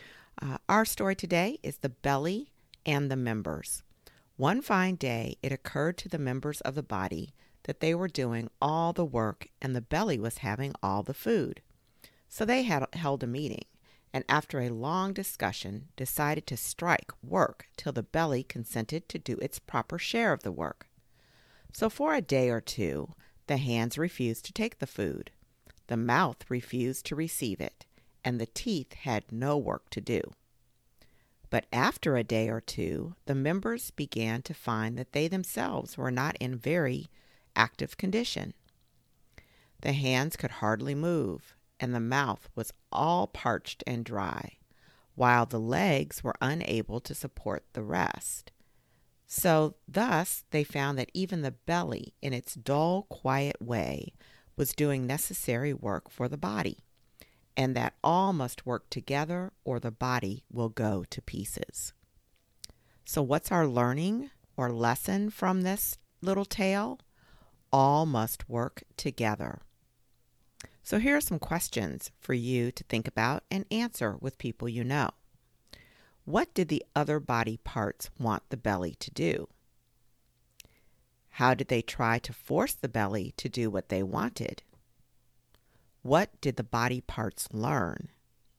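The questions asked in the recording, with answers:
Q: What did the other body parts want the belly to do?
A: Do its proper share of the work

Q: How did they try to force the belly to do what they wanted?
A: They went on strike: the hands wouldn't take food, the mouth wouldn't receive it, and the teeth did no work

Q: What did the body parts learn?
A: The belly does necessary work too, and all must work together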